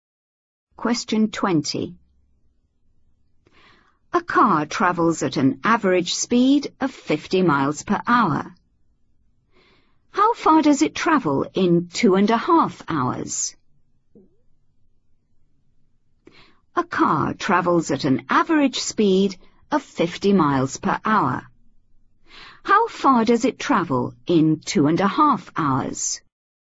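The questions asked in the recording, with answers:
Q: How far does it travel in 2.5 hours?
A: 125 miles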